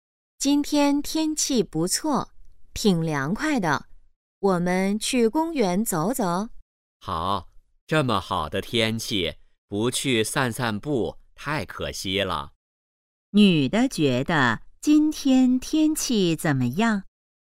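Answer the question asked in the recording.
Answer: 很好,挺凉快的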